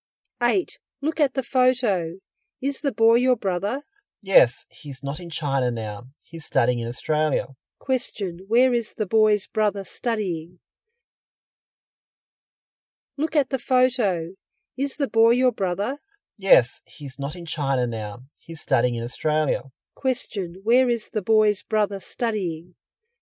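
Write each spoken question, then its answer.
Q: Question, where is the boy's brother studying?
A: In Australia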